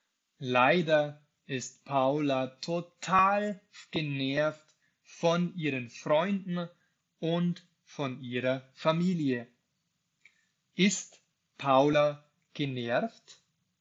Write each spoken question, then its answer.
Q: Ist Paula genervt?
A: Ja, sie ist genervt.